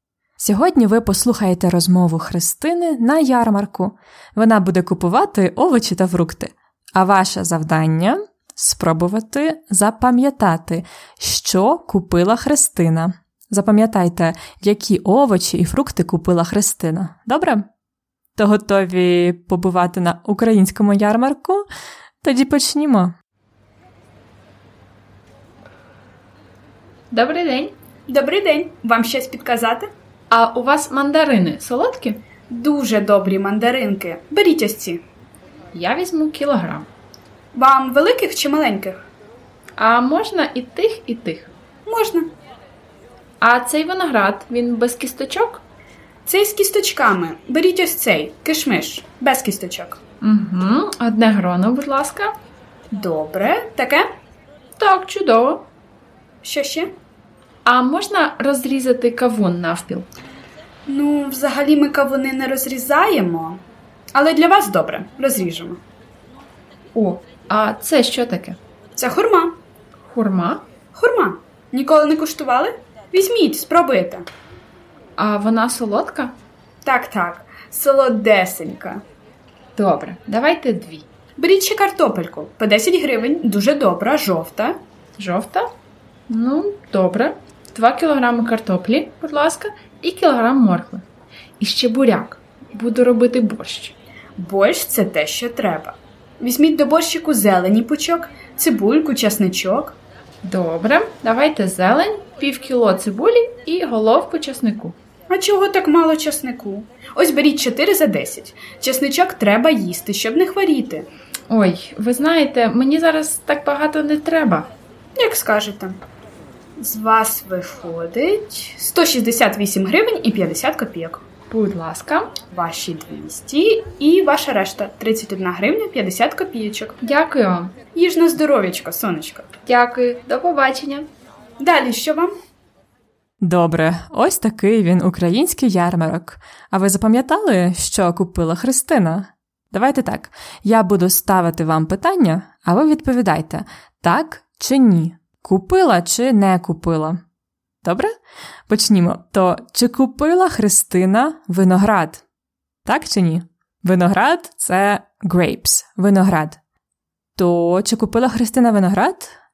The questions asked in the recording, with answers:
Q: То чи купила Христина виноград?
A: Так, вона купила виноград.